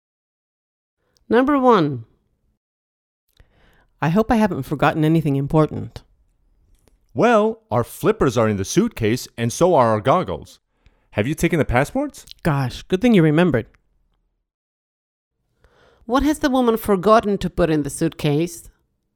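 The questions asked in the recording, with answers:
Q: What has the woman forgotten to put in the suitcase?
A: the passports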